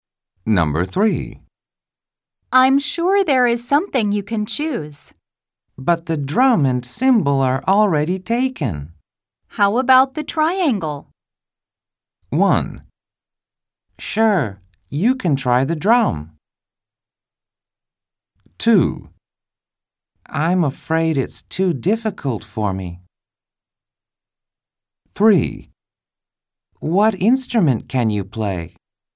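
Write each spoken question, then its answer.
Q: How about the triangle?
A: 2: I'm afraid it's too difficult for me.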